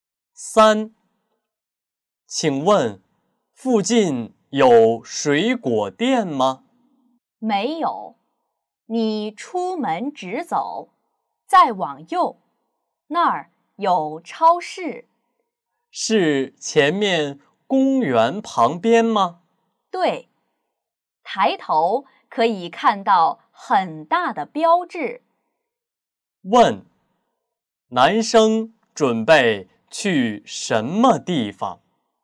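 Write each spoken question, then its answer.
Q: 男生准备去什么地方?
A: 超市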